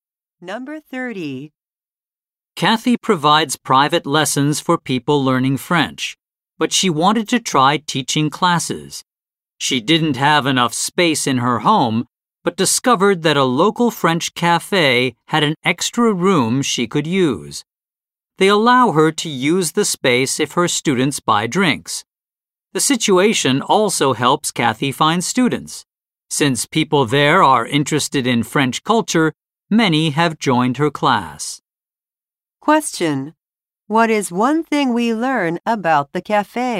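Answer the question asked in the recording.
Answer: It lets Kathy use its extra room if her students buy drinks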